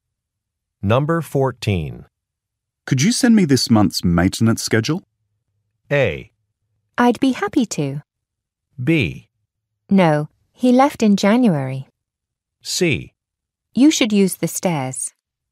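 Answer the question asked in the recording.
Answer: A: I'd be happy to.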